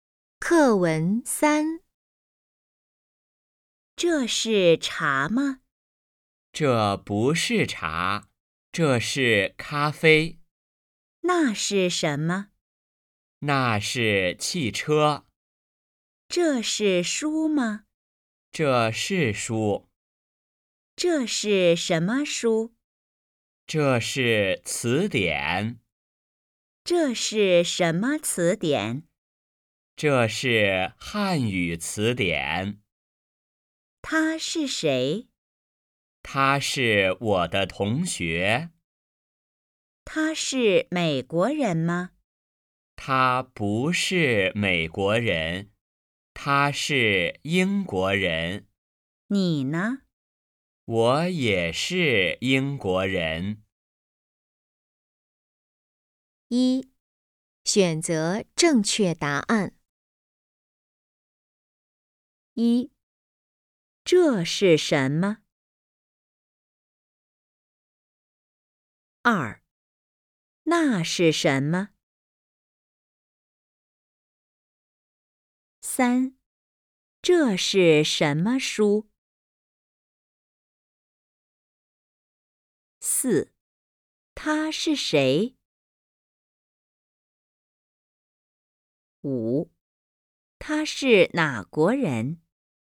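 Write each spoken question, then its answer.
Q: 这是什么?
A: 咖啡

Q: 那是什么?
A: 汽车

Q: 这是什么书?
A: 汉语词典

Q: 他是哪国人?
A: 英国人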